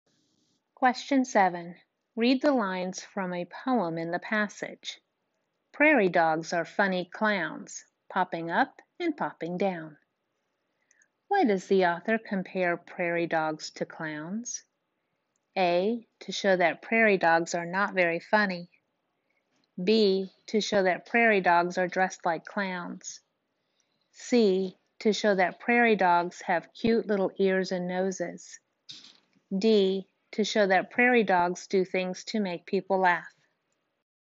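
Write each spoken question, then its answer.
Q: Why does the author compare prairie dogs to clowns?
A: D: to show that prairie dogs do things to make people laugh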